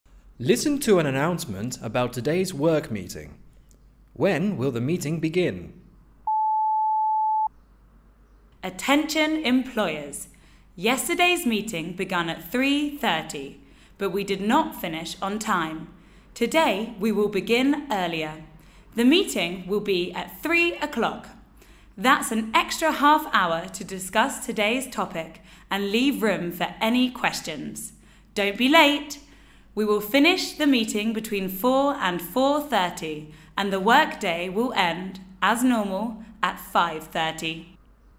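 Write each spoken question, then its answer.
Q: When will the meeting begin?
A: At 3:00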